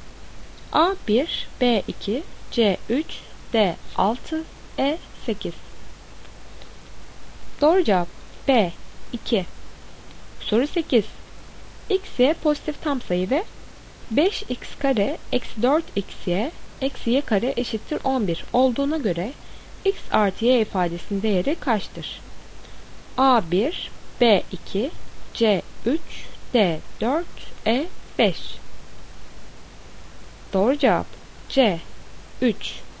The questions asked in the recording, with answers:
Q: X y pozitif tam sayı ve 5x kare eksi 4 xy eksi y kare eşittir 11 olduğuna göre x artı y ifadesinin değeri kaçtır?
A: Doğru cevap C 3.